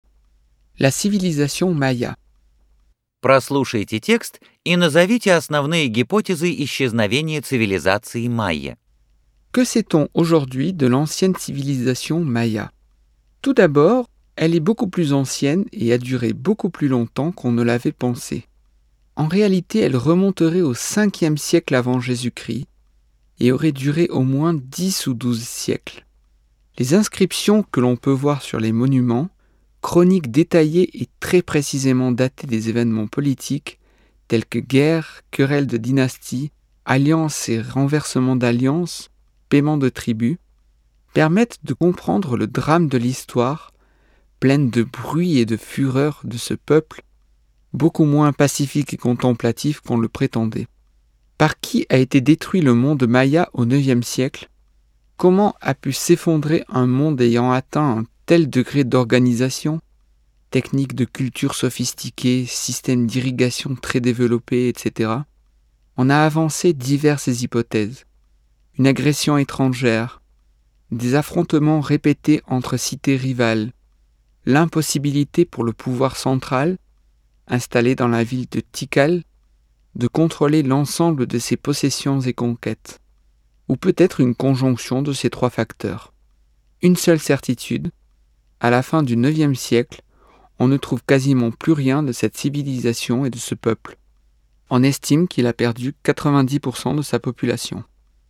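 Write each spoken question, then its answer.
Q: Прослушайте текст и назовите основные гипотезы исчезновения цивилизации майя.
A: Иностранное вторжение, постоянные столкновения между соперничающими городами, неспособность центральной власти в Тикале контролировать все свои владения и завоевания, или сочетание этих трёх факторов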